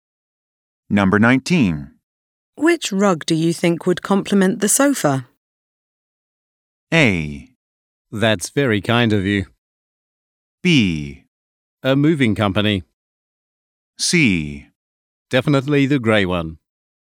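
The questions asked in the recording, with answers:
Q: Which rug do you think would complement the sofa?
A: C: Definitely the grey one.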